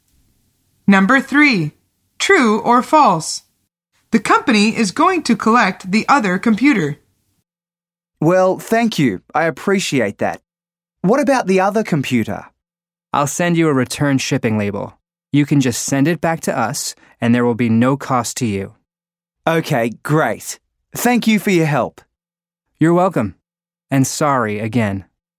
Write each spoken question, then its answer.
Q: True or false? The company is going to collect the other computer.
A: The answer is false. Greg needs to post it back.